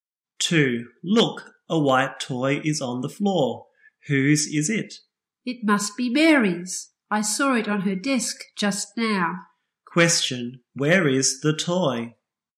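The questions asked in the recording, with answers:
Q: Question, where is the toy?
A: On the floor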